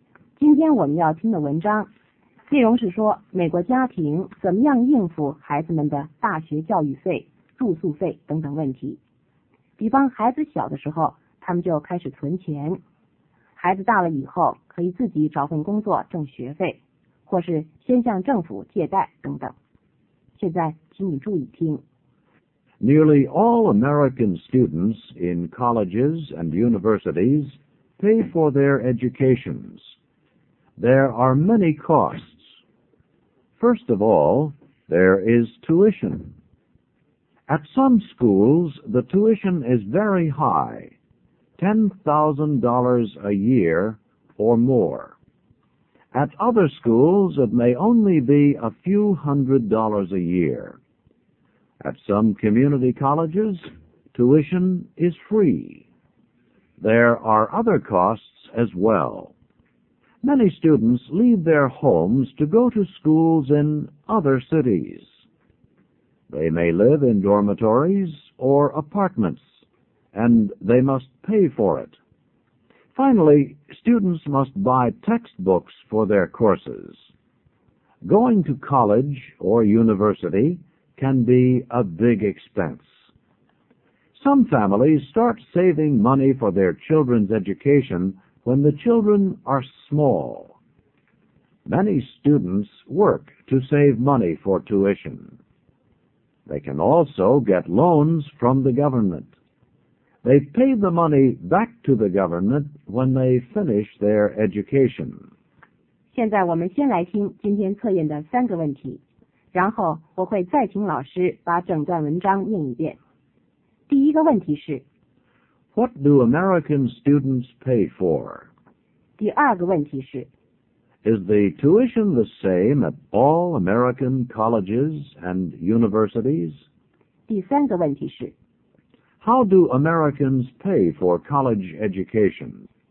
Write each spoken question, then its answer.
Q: What do American students pay for?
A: They pay tuition, and they buy textbooks for their courses. When they live in dormitories or apartments, they must pay for it as well.

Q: Is the tuition the same at all American colleges and universities?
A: No, it is not the same. It may be $10,000 a year, or only a few hundred dollars a year. At some schools,Tuition is free.

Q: How do Americans pay for college education?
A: American families save money for their children's education. Many students work to save money. They can also get loans from the government.